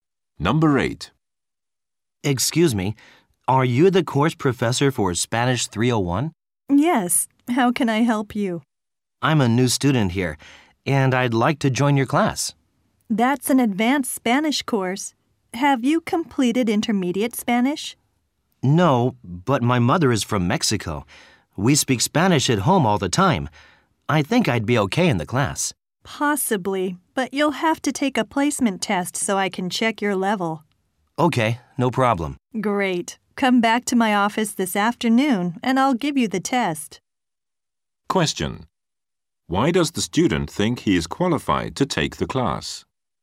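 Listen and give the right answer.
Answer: His mother is from Mexico and they speak Spanish at home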